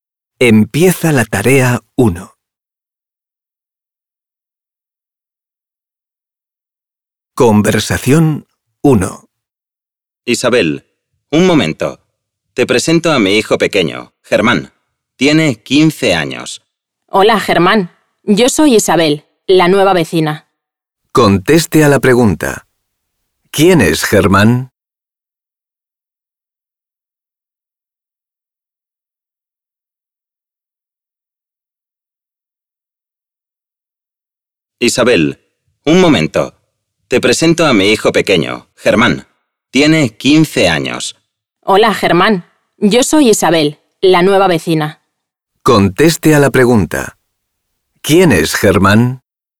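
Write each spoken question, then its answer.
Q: ¿Quién es Germán?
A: El hijo pequeño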